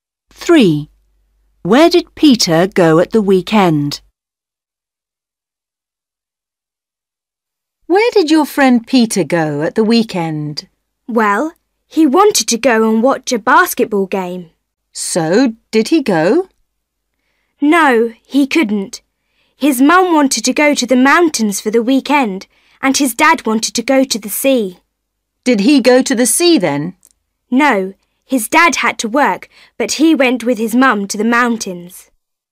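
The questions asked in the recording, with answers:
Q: Where did Peter go at the weekend?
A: to the mountains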